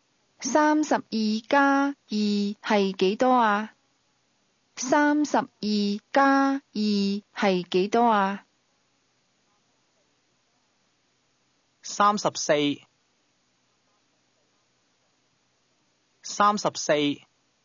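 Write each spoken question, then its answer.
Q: 係幾多啊?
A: 三十四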